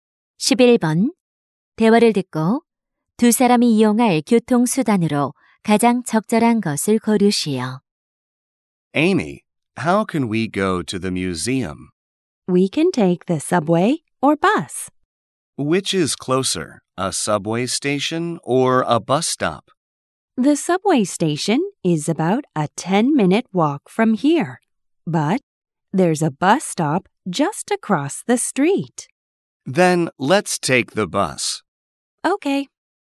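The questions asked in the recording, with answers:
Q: 대화를 듣고 두 사람이 이용할 교통수단으로 가장 적절한 것을 고르시오.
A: 버스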